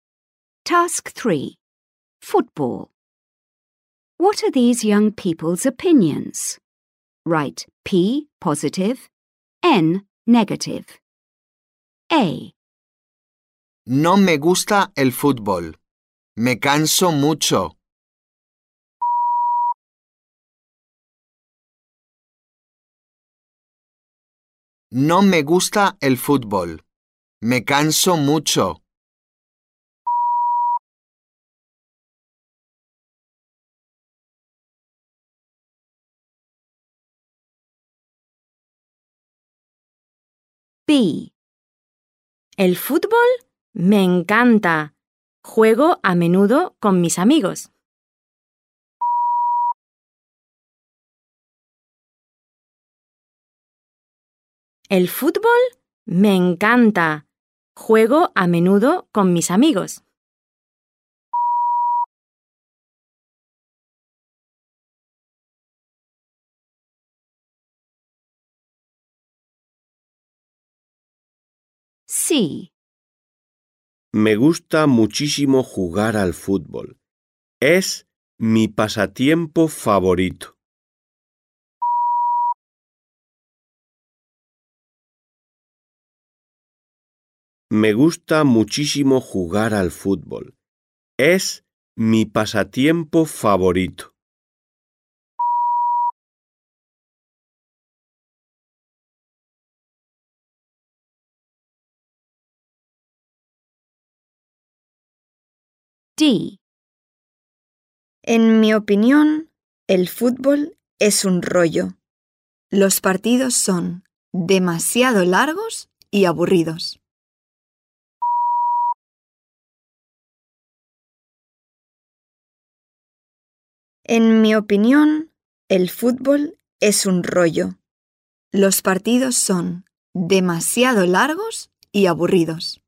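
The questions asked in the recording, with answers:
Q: What are these young people's opinions?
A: N (negative)

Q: What are these young people's opinions?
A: P (positive)

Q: What are these young people's opinions?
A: P (positive)

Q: What are these young people's opinions?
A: N (negative)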